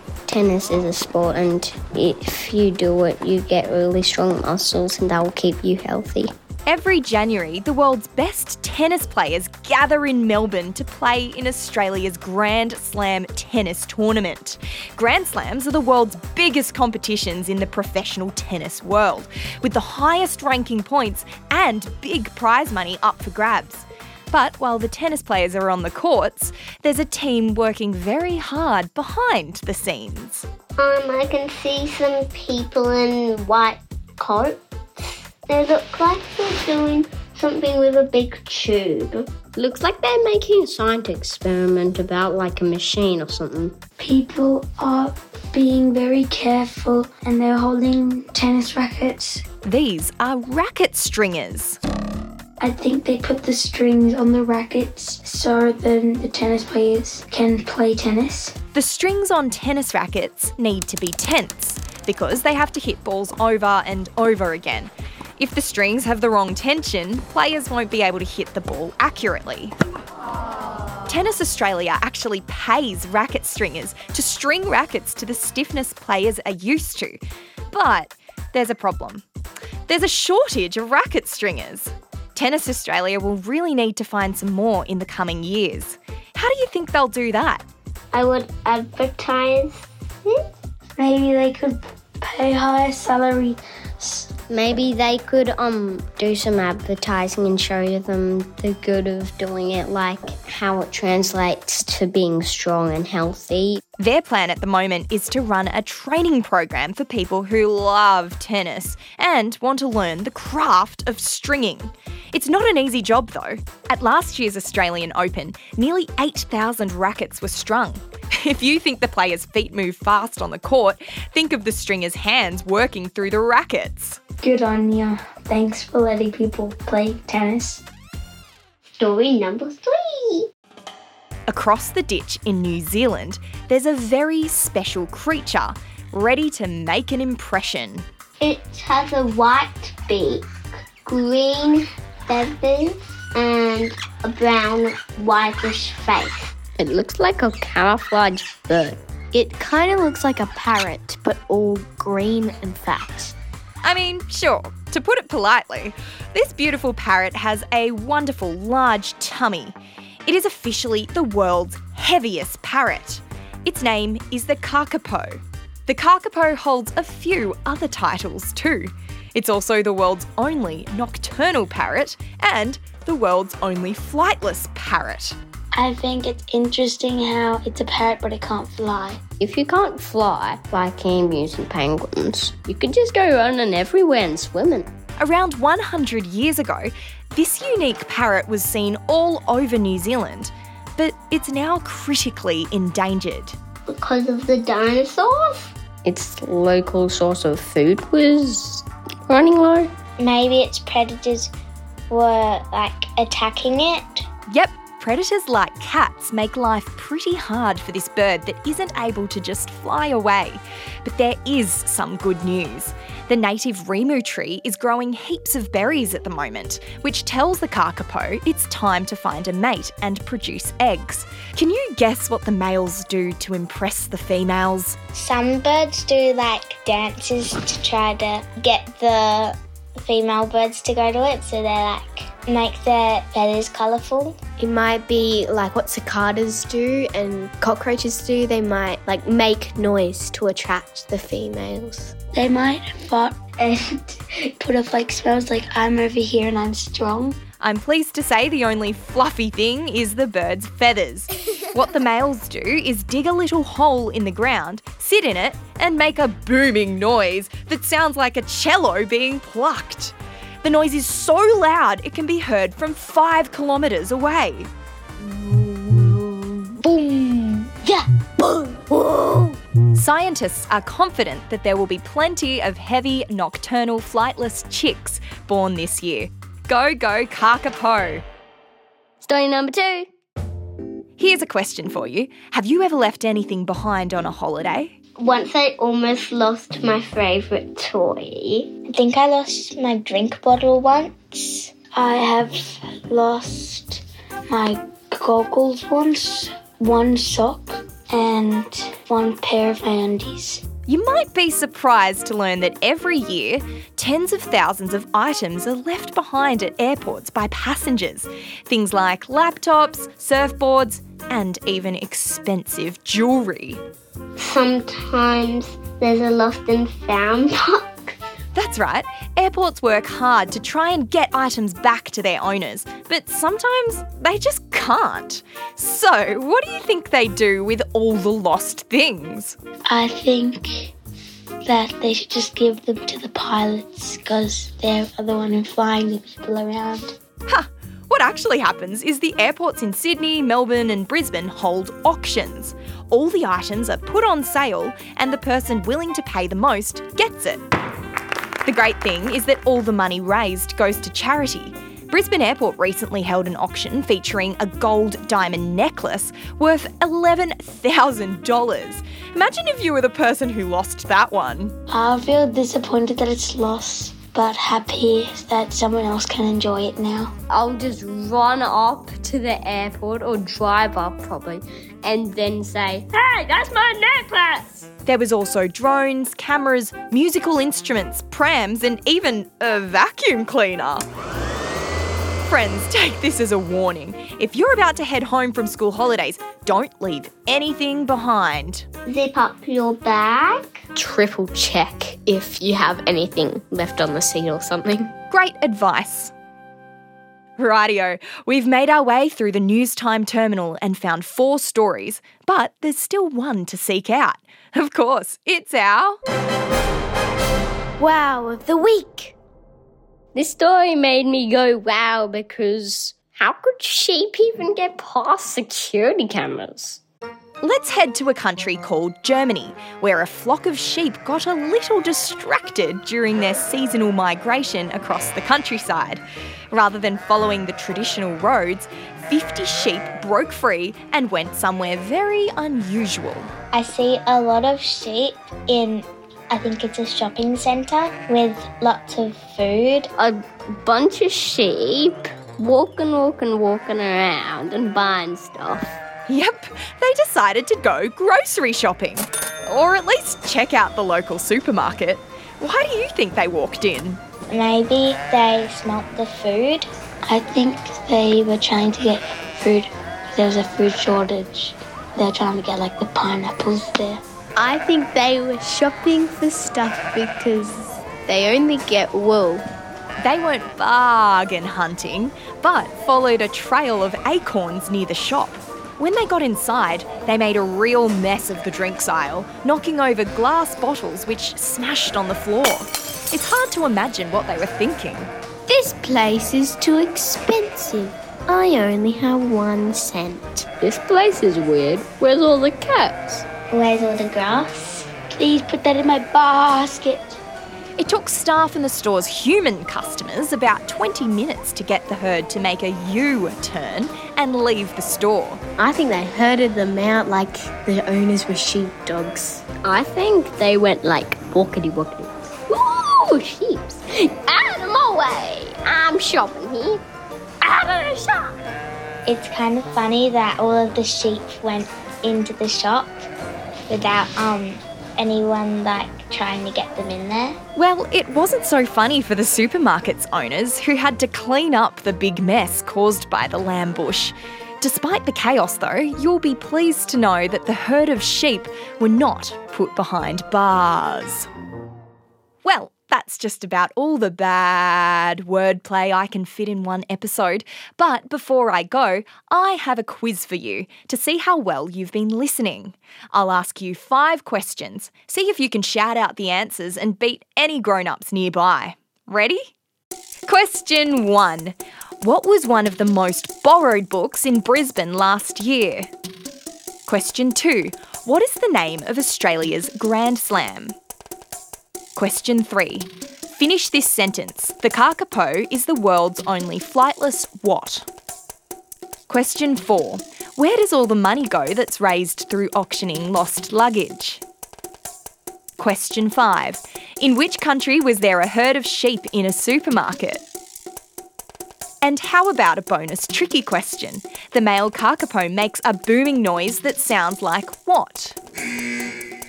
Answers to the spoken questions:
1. Australia's Grand Slam is called the Australian Open.
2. New Zealand's Kakapo is the world's only flightless parrot.
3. Money raised through airport auctions is given to charity.
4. And the herd of sheep visited a supermarket in Germany.
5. the male Kakapo's call for a mate sounds like a cello being plucked.